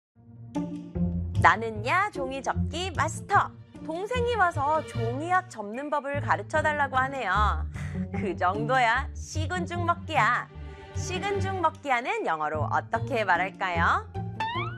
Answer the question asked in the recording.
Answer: 'It's a piece of cake.'